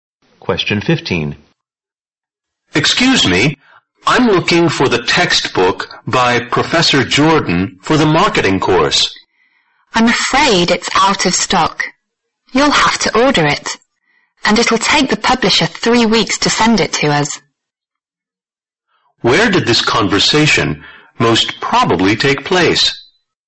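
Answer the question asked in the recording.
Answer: In a bookstore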